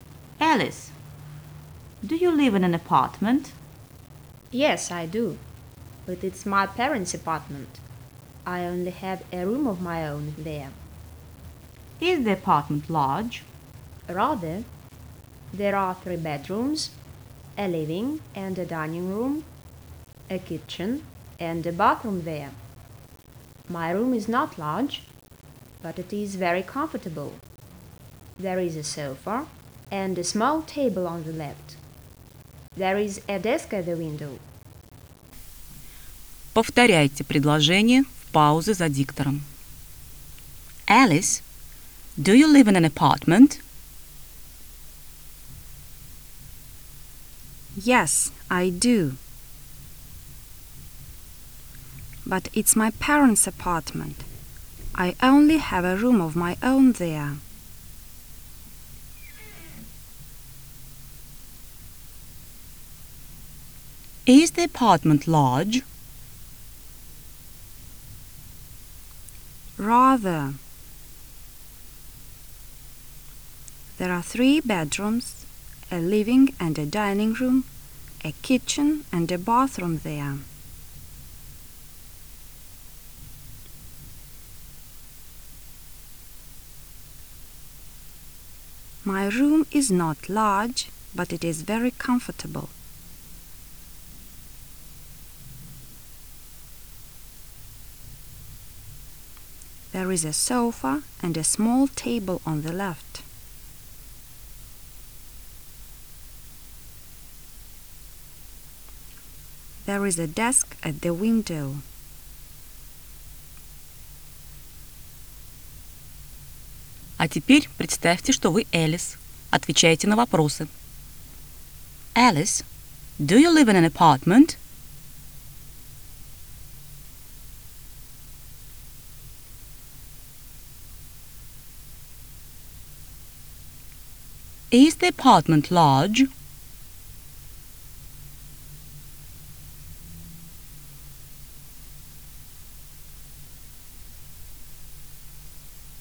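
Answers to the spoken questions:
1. Yes, but it's her parents' apartment.
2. Rather: 3 bedrooms, a living room, a dining room, a kitchen and a bathroom.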